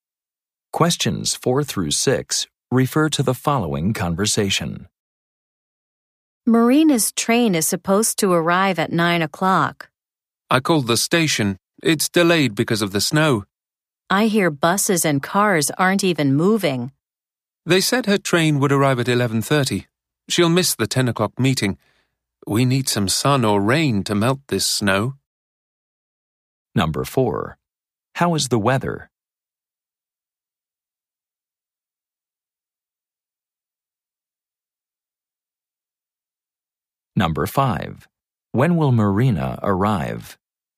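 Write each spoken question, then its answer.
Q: How is the weather?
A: Snowy

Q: When will Marina arrive?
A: At 11:30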